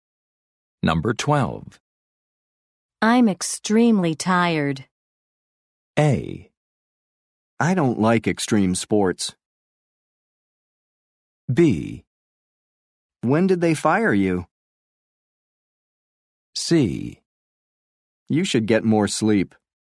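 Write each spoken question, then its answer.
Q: I'm extremely tired.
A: C: You should get more sleep.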